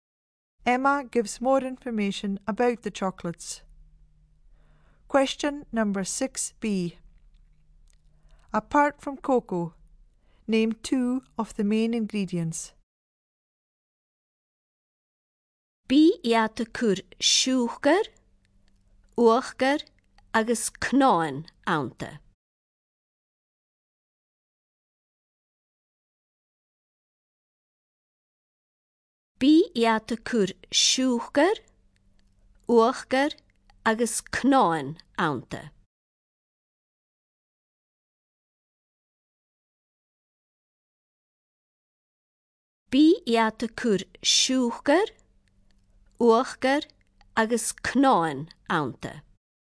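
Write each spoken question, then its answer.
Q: Apart from cocoa, name two of the main ingredients.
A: Two of: sugar, cream, nuts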